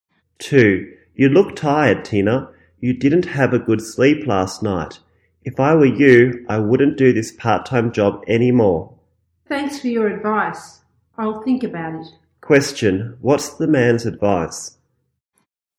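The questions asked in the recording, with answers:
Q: What's the man's advice?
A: Stop doing the part-time job.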